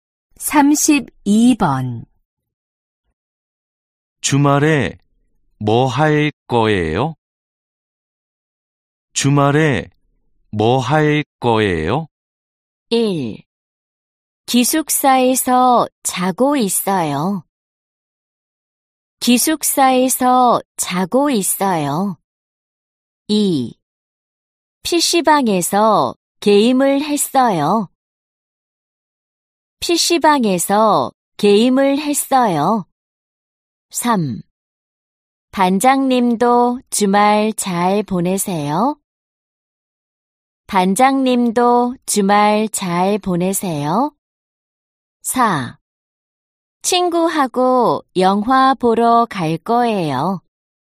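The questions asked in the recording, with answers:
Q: 주말에 뭐 할 거예요?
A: 4: 친구하고 영화 보러 갈 거예요.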